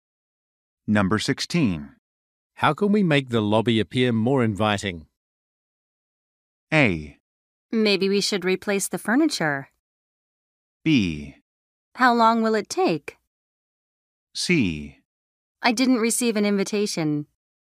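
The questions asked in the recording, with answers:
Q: How can we make the lobby appear more inviting?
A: A: Maybe we should replace the furniture.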